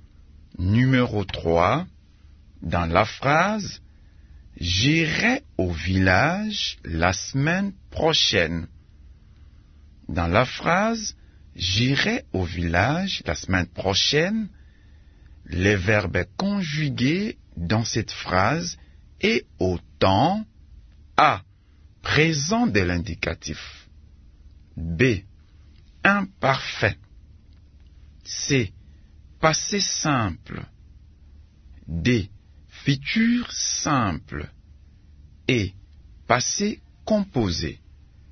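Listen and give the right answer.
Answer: D: Futur simple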